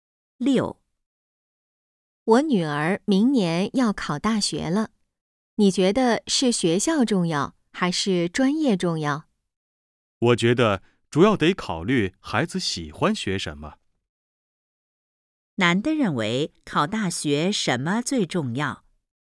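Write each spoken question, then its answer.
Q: 男的认为考大学什么最重要?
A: 孩子喜欢学什么(孩子的兴趣)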